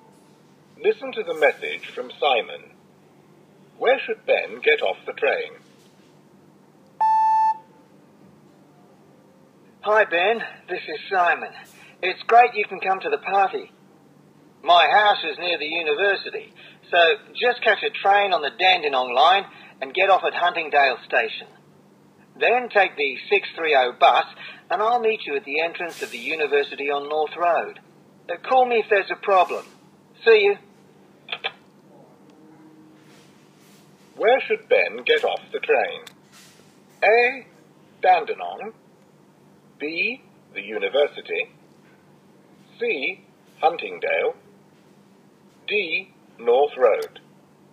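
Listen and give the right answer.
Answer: C: Huntingdale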